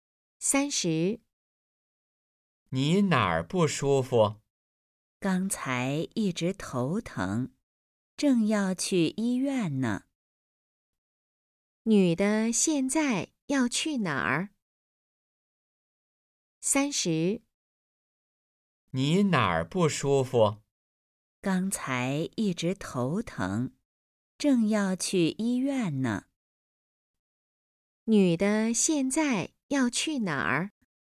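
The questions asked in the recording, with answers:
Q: 女的现在要去哪儿?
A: 医院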